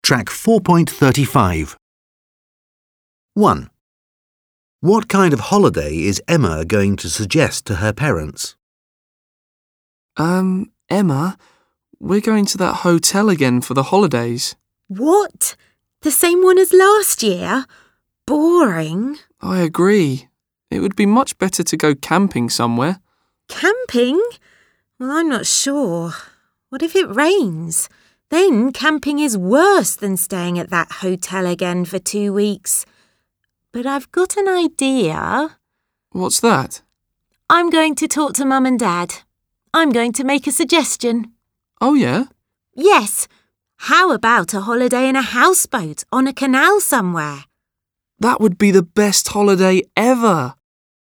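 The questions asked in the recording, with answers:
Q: What kind of holiday is Emma going to suggest to her parents?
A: A holiday on a houseboat on a canal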